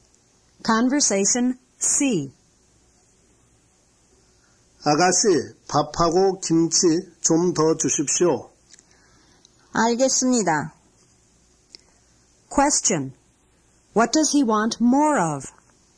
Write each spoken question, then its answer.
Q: What does he want more of?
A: He wants more rice and kimchi.